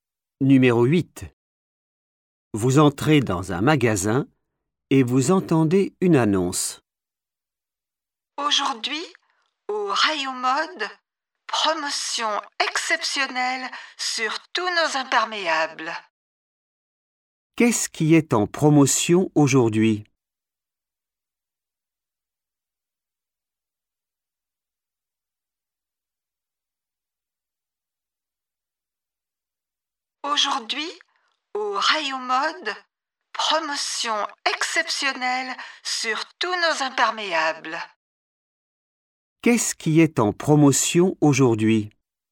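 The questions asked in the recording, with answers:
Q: Qu'est-ce qui est en promotion aujourd'hui?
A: les imperméables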